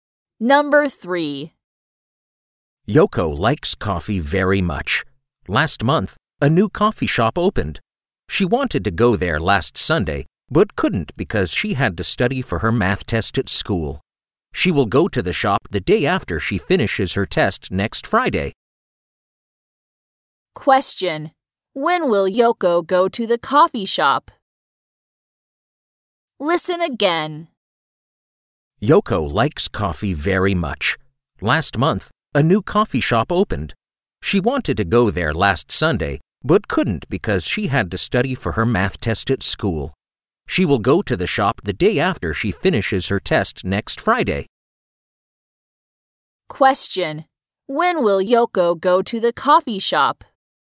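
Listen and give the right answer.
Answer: Next Saturday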